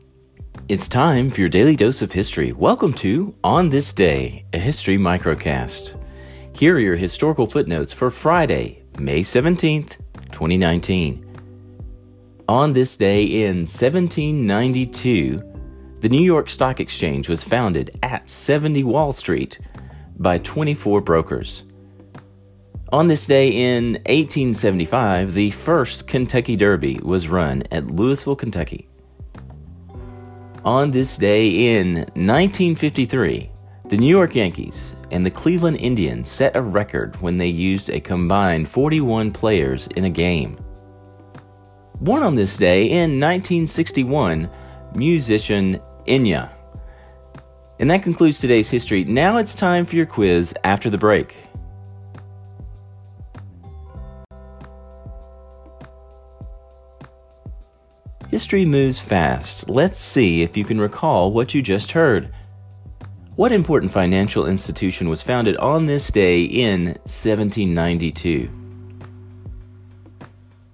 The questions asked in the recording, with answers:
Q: What important financial institution was founded on this day in 1792?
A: Answer the New York Stock Exchange.